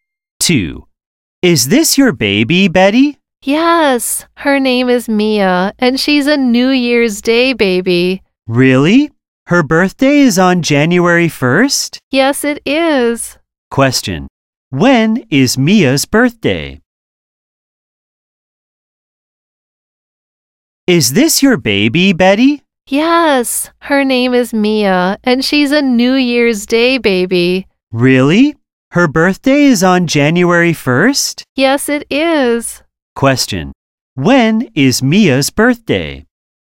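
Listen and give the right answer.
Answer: January 1st (New Year's Day)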